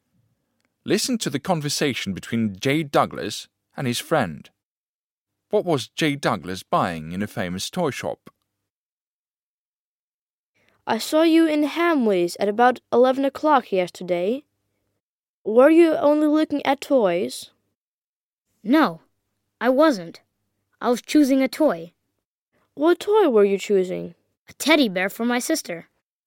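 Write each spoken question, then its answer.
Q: What was Jay Douglas buying in a famous toy shop?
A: A teddy bear for his sister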